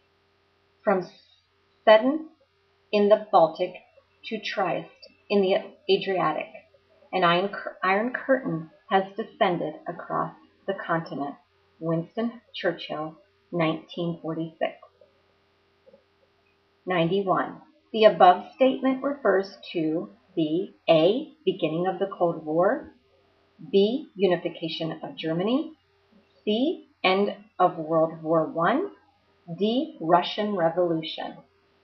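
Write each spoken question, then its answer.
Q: The above statement refers to the A.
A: A: Beginning of the Cold War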